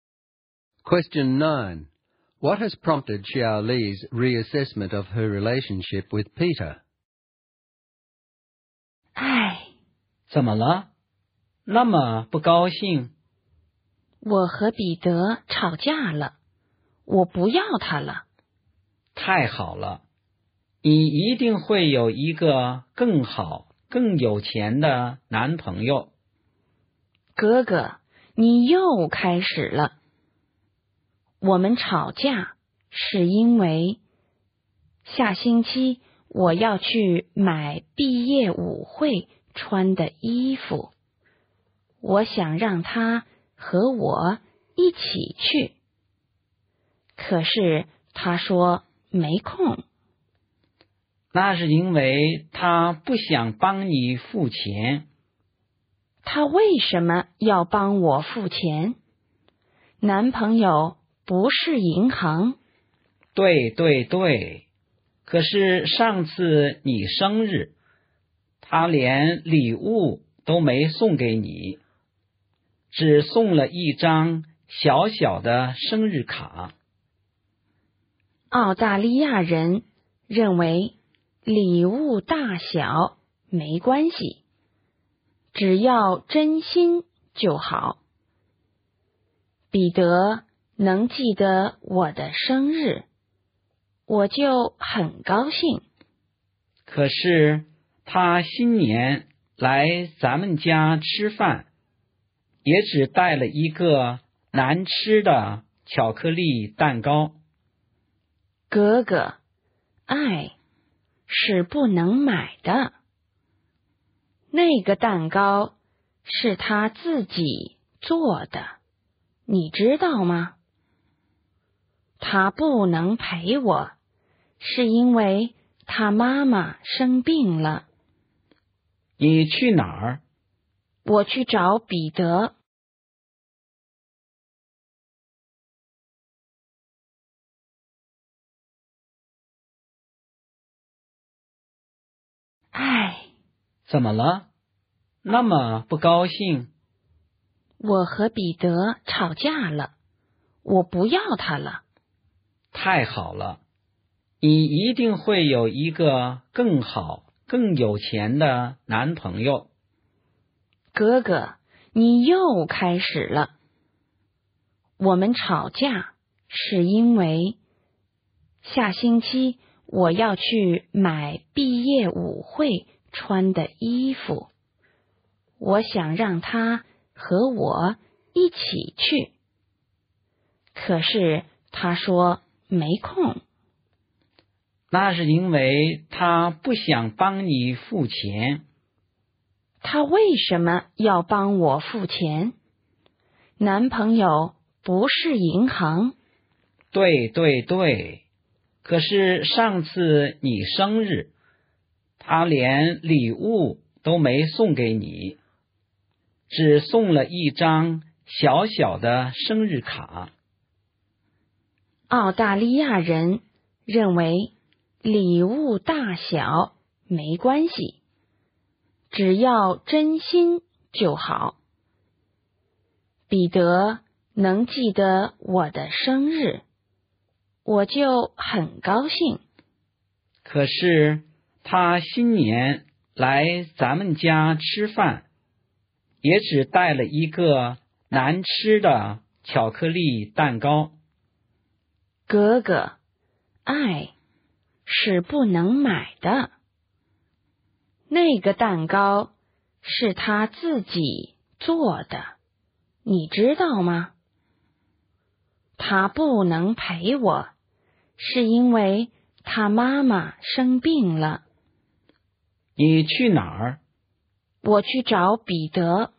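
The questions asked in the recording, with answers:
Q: What has prompted Xiao Li's reassessment of her relationship with Peter?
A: Her brother's criticisms make her defend Peter. She realises that he is sincere, that he made the cake himself, and that he couldn't come with her because his mother was ill.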